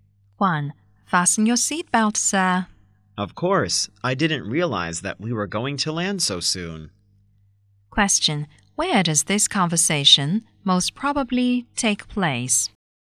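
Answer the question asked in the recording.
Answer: On a plane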